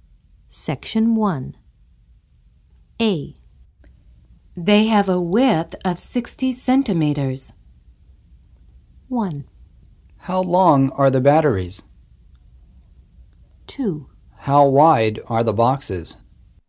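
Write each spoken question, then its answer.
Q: They have a width of 60 centimeters.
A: 2: How wide are the boxes?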